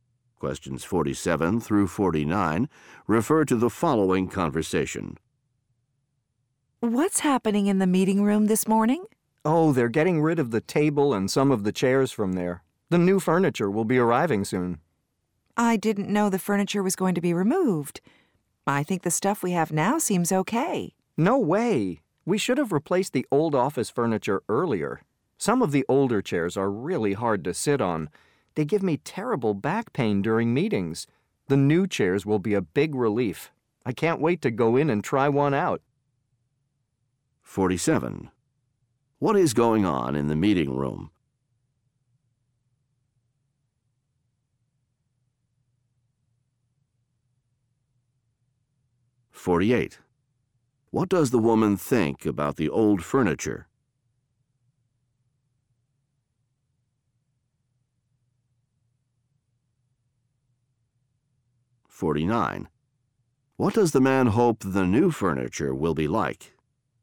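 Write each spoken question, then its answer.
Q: What is going on in the meeting room?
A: Old furniture is being removed

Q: What does the man hope the new furniture will be like?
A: More comfortable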